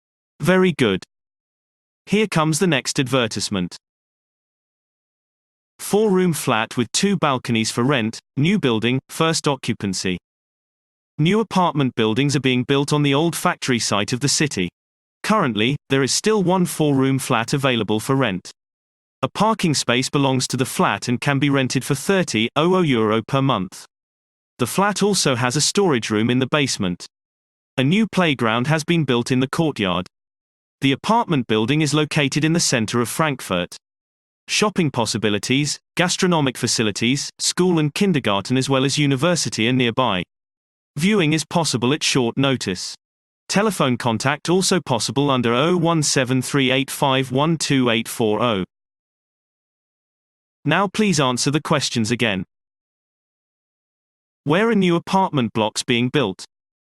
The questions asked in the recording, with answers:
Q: Where are new apartment blocks being built?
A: Answer. The apartment buildings are being built on the old factory site in the city.